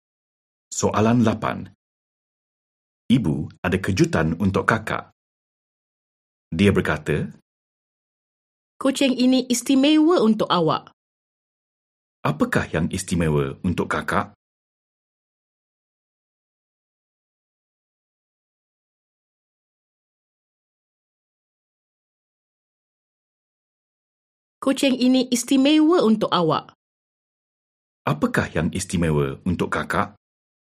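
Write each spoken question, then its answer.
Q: Apakah yang istimewa untuk kakak?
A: Kucing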